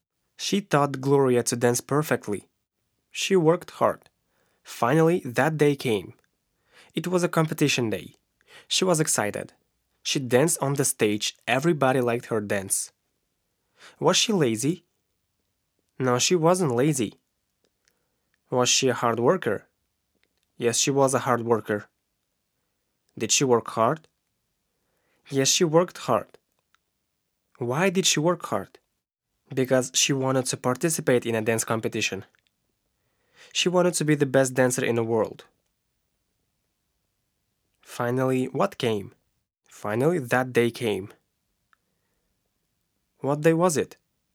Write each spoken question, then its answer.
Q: What day was it?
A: It was a competition day.